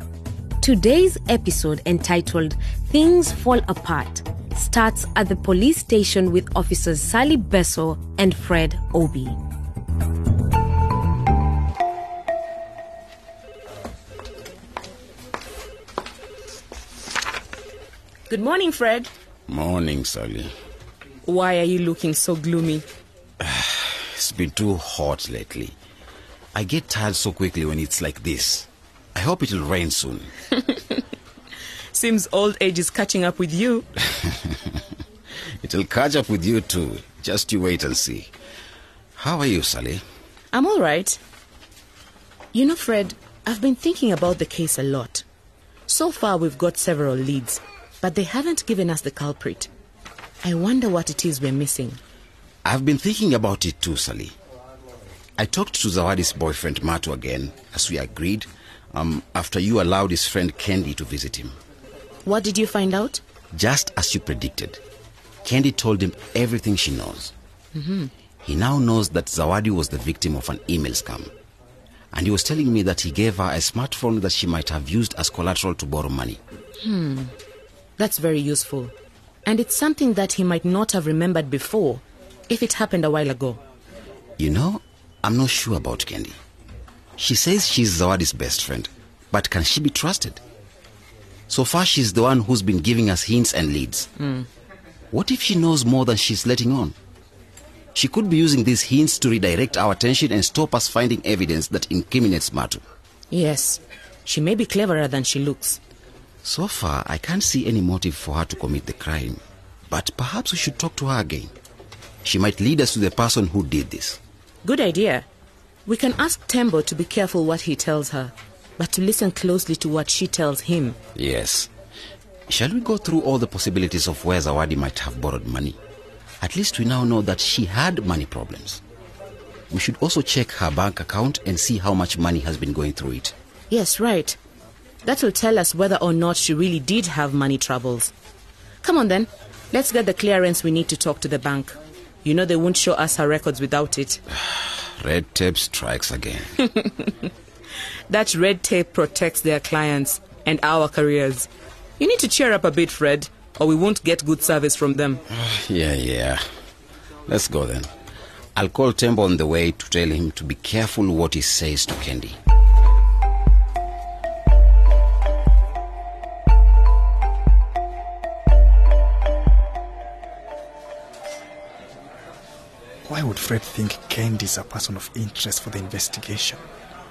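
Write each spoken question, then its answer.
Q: Why would Fred think Kendi is a person of interest for the investigation?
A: She has been giving them all the hints and leads, and she might know more than she says. She could be using the hints to draw attention away from evidence against Matu.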